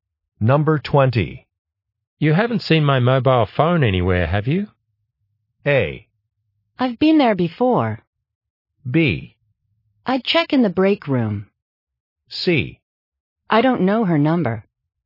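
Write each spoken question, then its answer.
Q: You haven't seen my mobile phone anywhere, have you?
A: B: I'd check in the break room.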